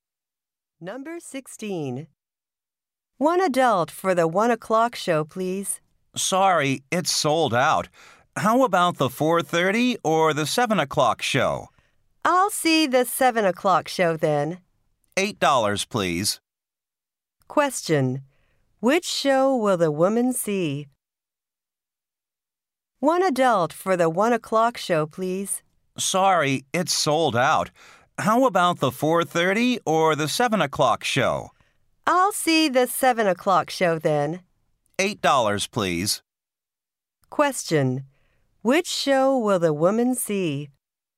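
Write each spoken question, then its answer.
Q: Which show will the woman see?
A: The 7 o'clock show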